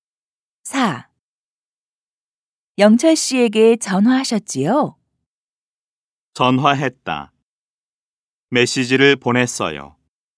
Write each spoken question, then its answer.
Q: 영철 씨에게 전화하셨지요?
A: 아니요. 전화한 게 아니라 메시지를 보냈어요.